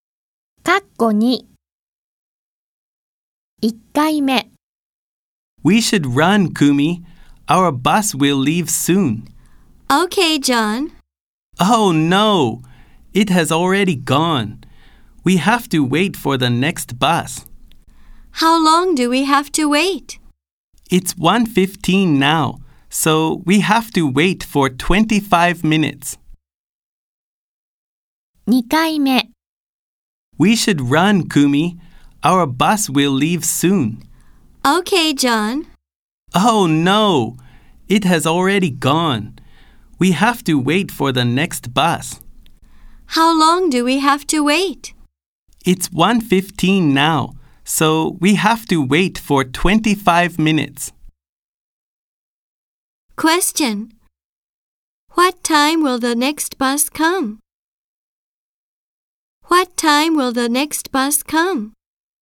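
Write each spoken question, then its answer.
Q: What time will the next bus come?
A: At 1:40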